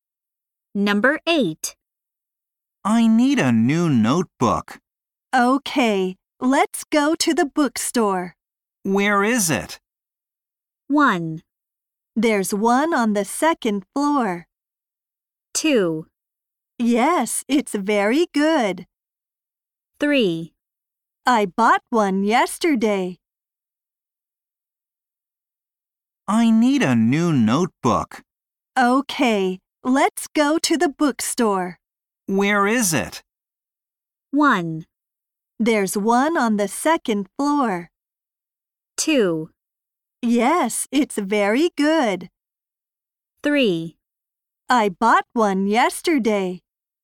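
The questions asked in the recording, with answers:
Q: Where is it?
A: 1: There's one on the second floor.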